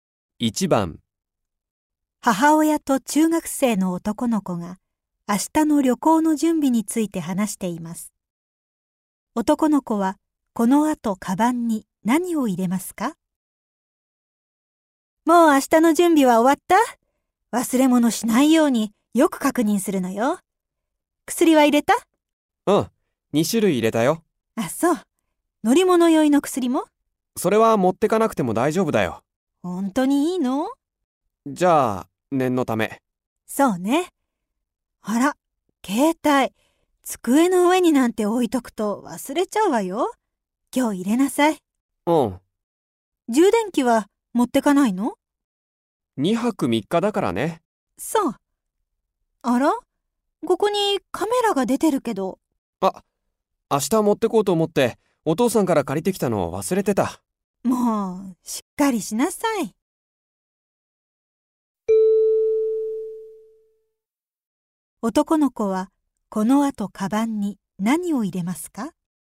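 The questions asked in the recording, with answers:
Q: 男の子はこの後カバンに何を入れますか?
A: 乗り物酔いの薬、携帯、カメラ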